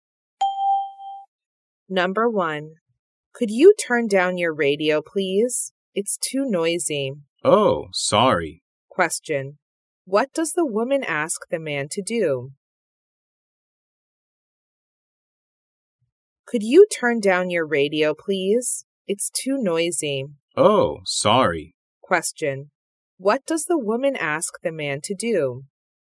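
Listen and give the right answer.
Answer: Turn down his radio.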